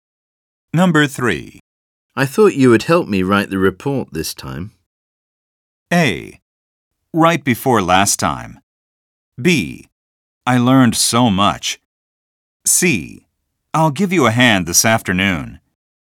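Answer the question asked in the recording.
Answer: C: I'll give you a hand this afternoon.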